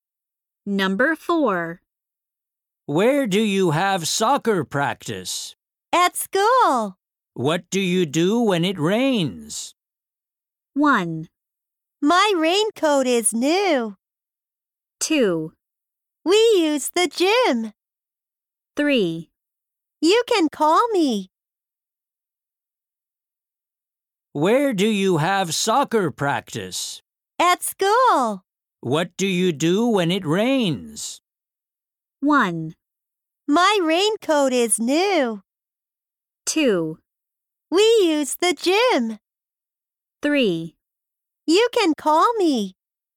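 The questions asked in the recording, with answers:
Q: What do you do when it rains?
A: 2: We use the gym.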